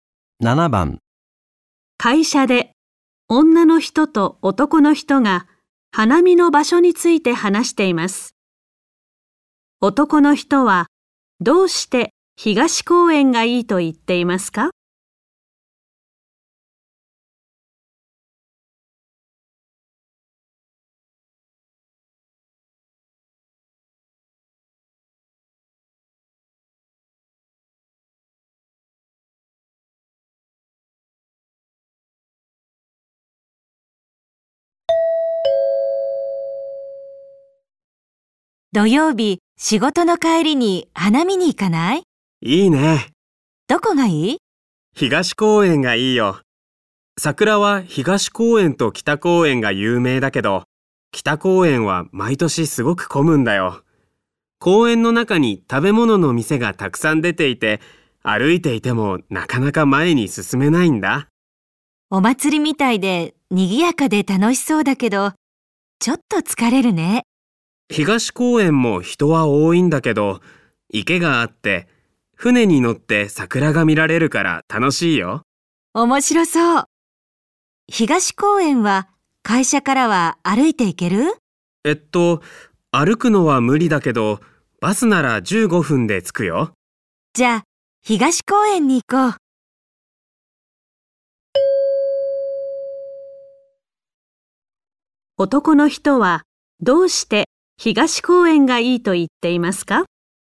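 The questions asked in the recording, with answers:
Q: 男の人はどうして東公園がいいと言っていますか?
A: 池で船に乗って桜が見られるから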